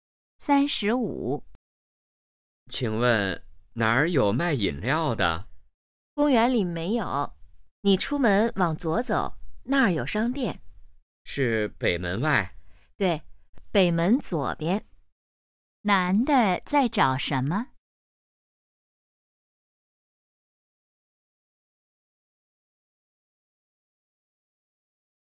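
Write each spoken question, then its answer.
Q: 男的在找什么?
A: 卖饮料的地方(商店)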